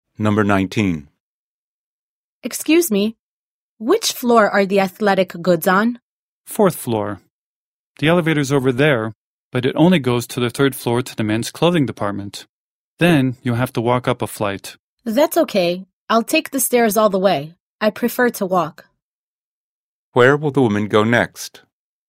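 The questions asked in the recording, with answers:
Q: Where will the woman go next?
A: To the fourth floor (athletic goods), taking the stairs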